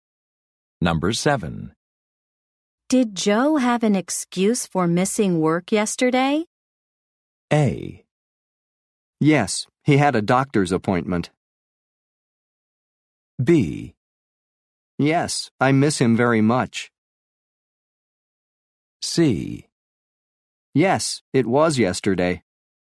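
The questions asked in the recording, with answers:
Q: Did Joe have an excuse for missing work yesterday?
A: A: Yes, he had a doctor's appointment.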